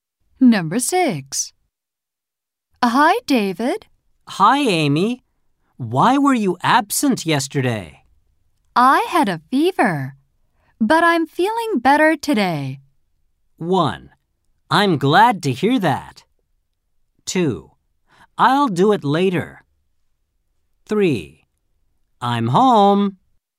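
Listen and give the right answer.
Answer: 1: I'm glad to hear that.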